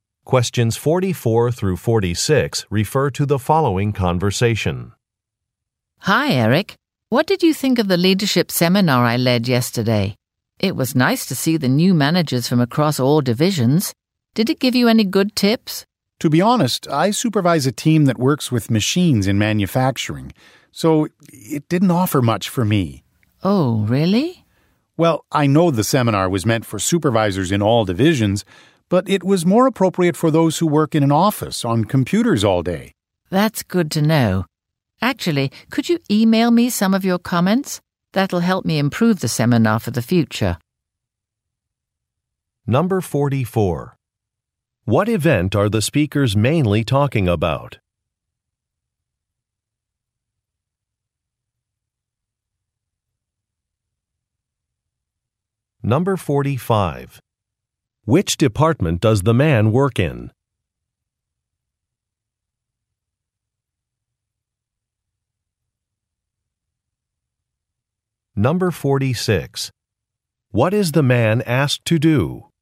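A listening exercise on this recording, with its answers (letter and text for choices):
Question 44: What event are the speakers mainly talking about?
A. A technology convention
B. A management seminar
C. A corporate fund-raiser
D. A job fair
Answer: B. A management seminar

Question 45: Which department does the man work in?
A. Shipping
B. Accounting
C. Manufacturing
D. Graphic design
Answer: C. Manufacturing

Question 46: What is the man asked to do?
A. Make an online payment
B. Reserve computer equipment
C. Provide written feedback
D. Choose a catering service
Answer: C. Provide written feedback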